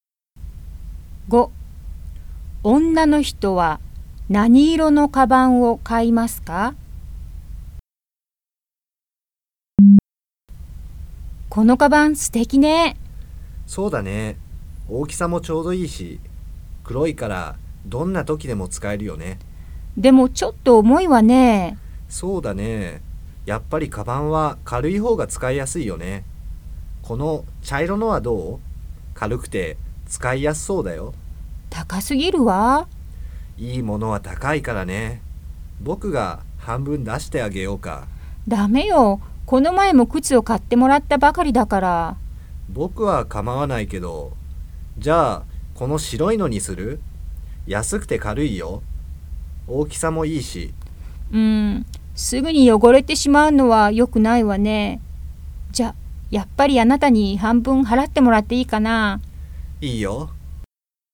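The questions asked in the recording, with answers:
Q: 女の人は何色のカバンを買いますか?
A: 茶色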